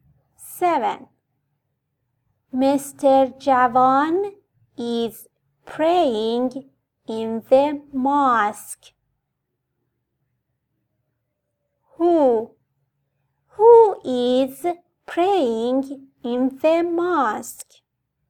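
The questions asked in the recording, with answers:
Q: Who is praying in the mosque?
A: Mr. Javan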